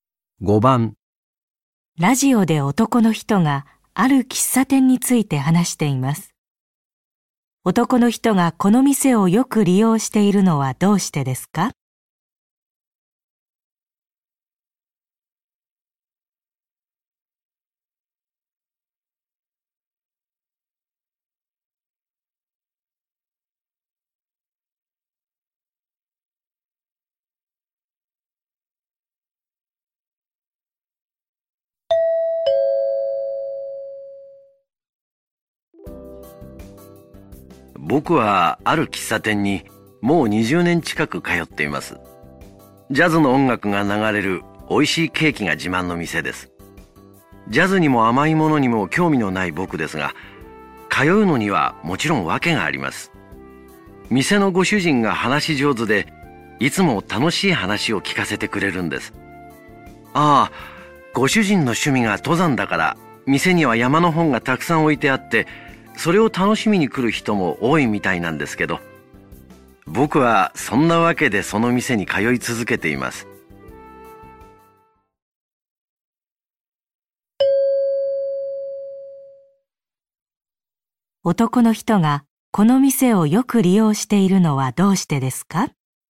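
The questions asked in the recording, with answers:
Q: 男の人がこの店をよく利用しているのはどうしてですか?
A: 店のご主人の話が楽しいから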